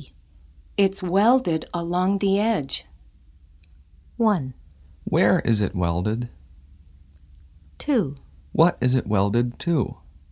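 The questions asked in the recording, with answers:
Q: Where is it welded?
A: Along the edge.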